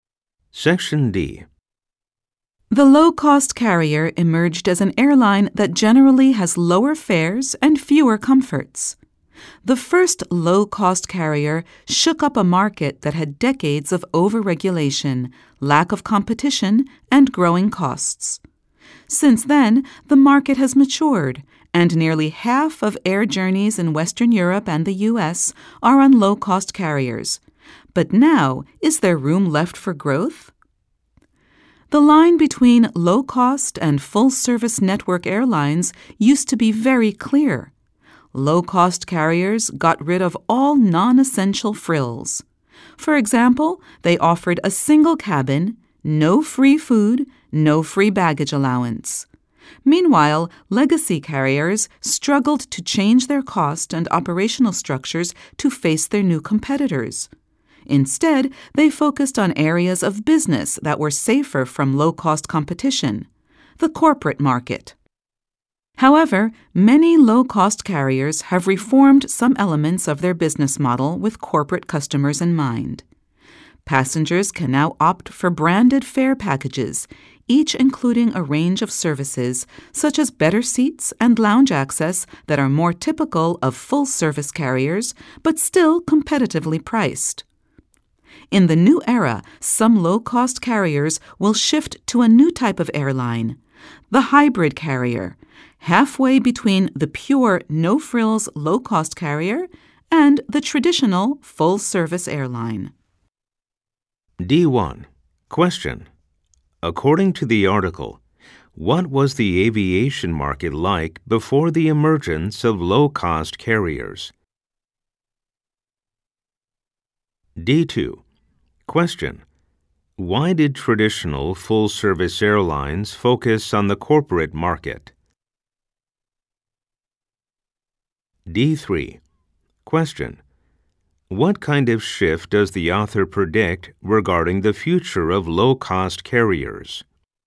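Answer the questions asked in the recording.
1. Over-regulated, with little competition and growing costs
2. They struggled to change their cost structures, and the corporate market was safer from low-cost competition
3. Some will become hybrid carriers, halfway between no-frills low-cost and full-service airlines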